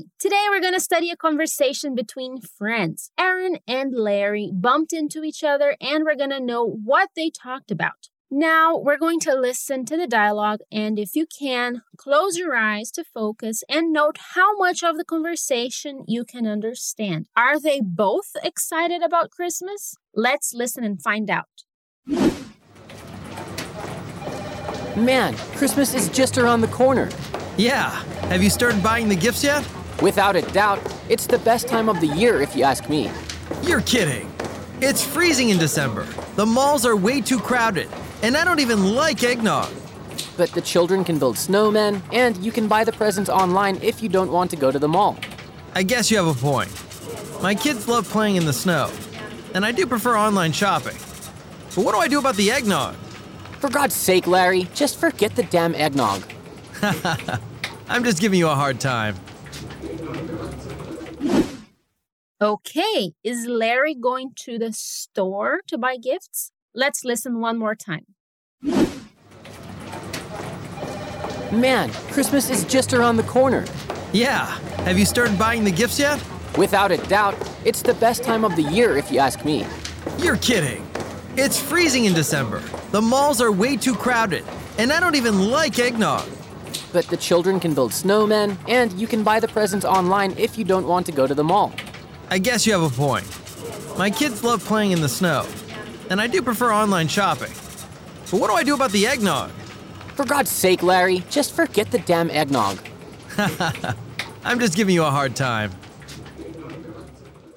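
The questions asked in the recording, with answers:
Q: Are they both excited about Christmas?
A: No, only Aaron is; Larry doesn't like the cold, crowded malls or eggnog.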